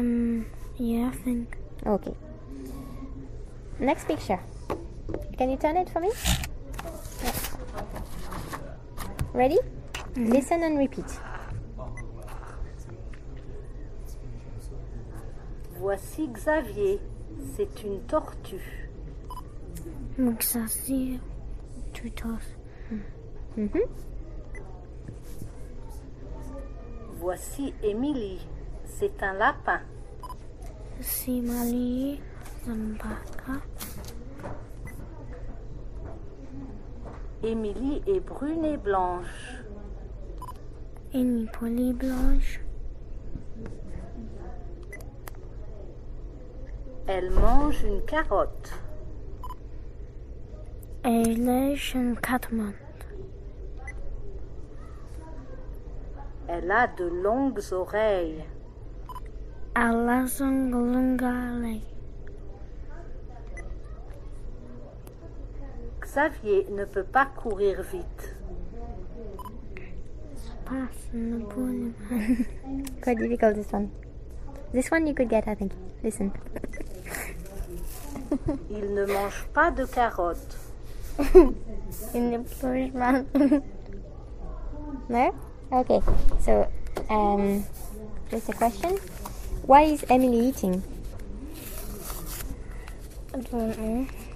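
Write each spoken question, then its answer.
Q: Why is Emily eating?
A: A carrot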